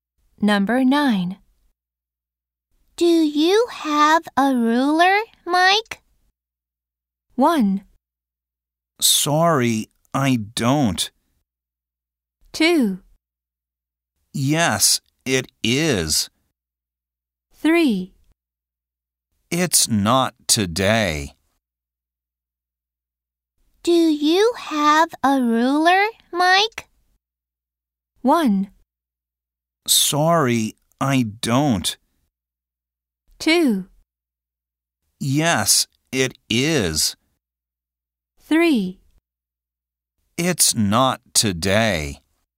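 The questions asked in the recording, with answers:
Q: Do you have a ruler, Mike?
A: 1: Sorry, I don't.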